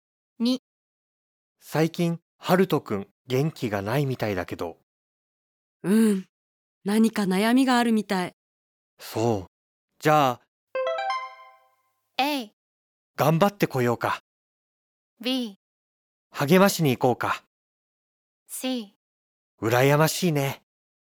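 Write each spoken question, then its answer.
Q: そう、じゃあ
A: B: 励ましに行こうか。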